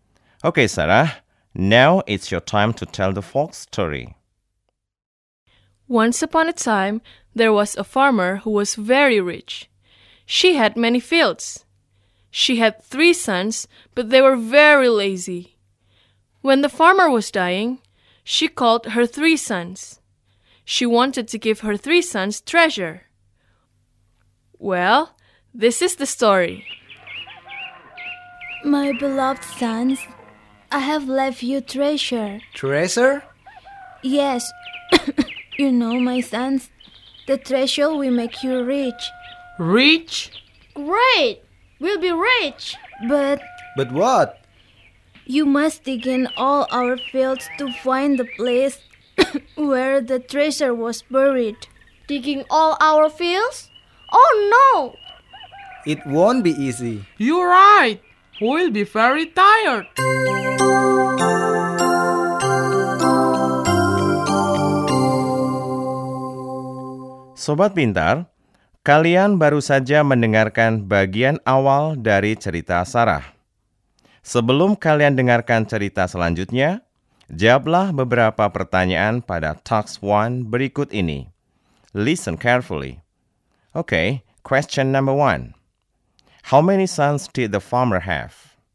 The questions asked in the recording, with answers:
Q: How many sons did the farmer have?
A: 3. Right. The farmer had 3 sons.